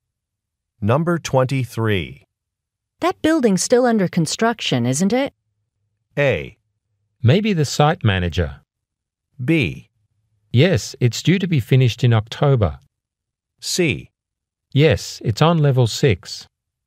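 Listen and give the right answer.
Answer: B: Yes, it's due to be finished in October.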